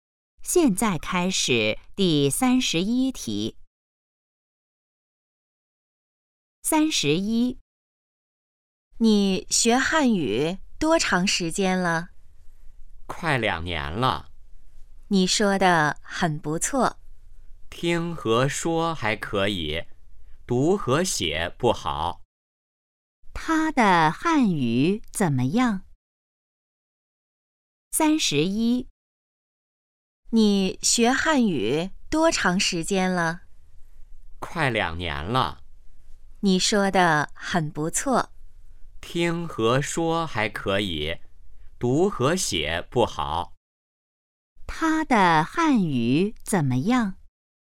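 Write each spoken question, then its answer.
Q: 他的汉语怎么样?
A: 听和说还可以,读和写不好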